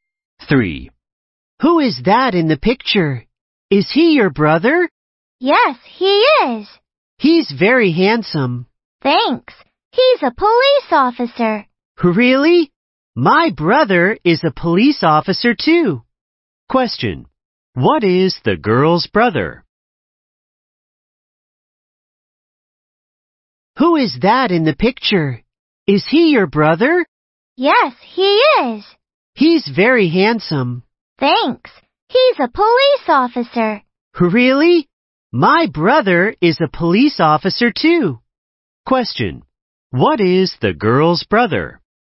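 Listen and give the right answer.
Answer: A police officer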